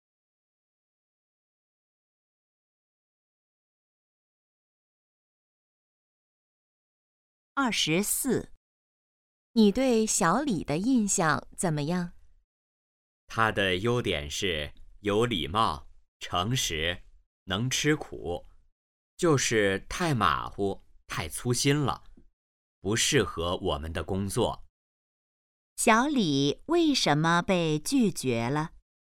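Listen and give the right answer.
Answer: 太马虎、太粗心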